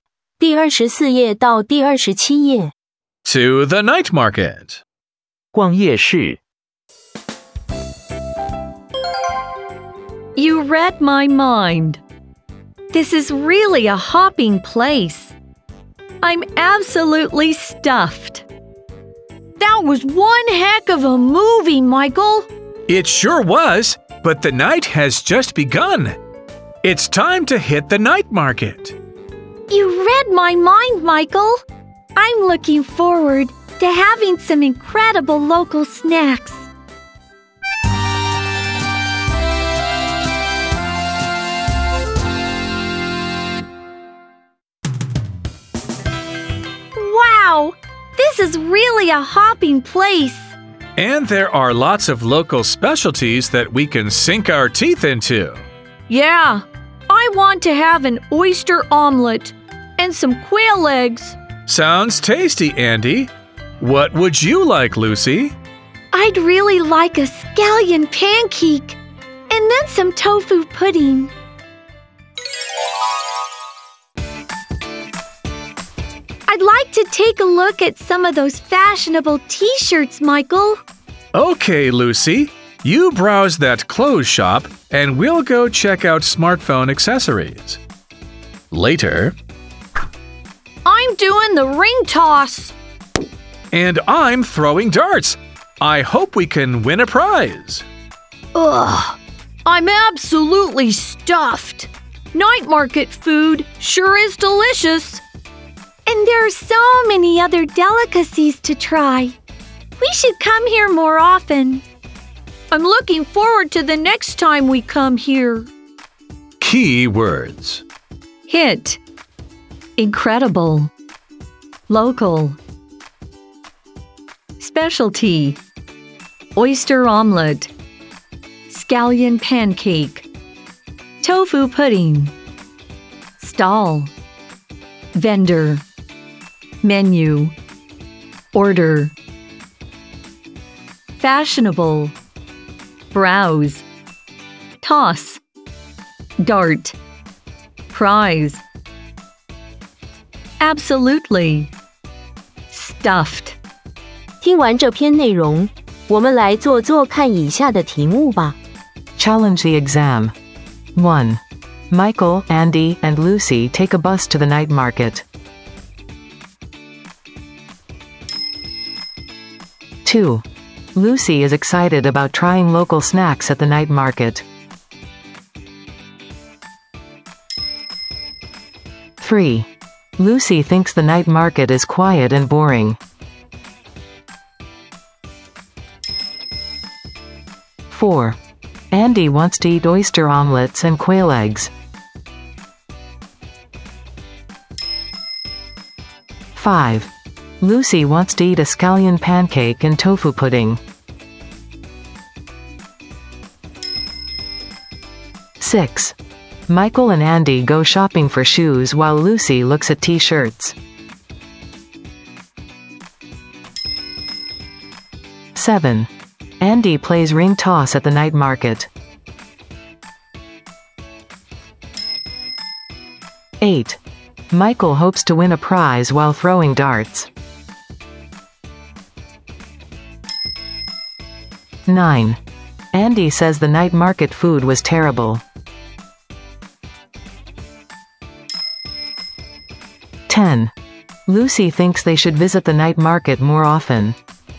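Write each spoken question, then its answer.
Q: Andy wants to eat oyster omelets and quail eggs.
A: True

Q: Lucy wants to eat a scallion pancake and tofu pudding.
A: True

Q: Michael and Andy go shopping for shoes while Lucy looks at t-shirts.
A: False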